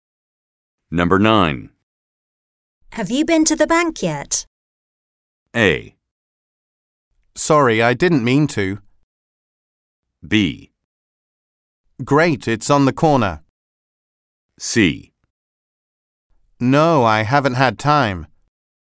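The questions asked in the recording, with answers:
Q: Have you been to the bank yet?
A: C: No, I haven't had time.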